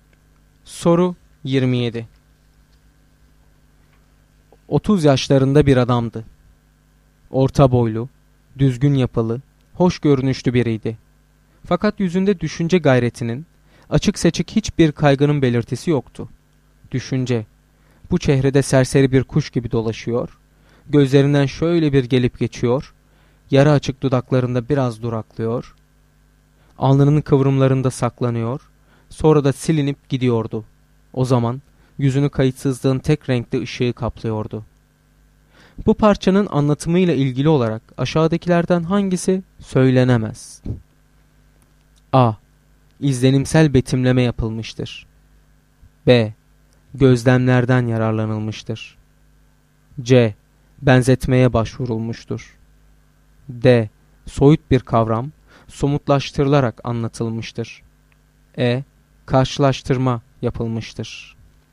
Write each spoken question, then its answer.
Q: Bu parçanın anlatımıyla ilgili olarak aşağıdakilerden hangisi söylenemez?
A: Doğru cevap E şıkkı.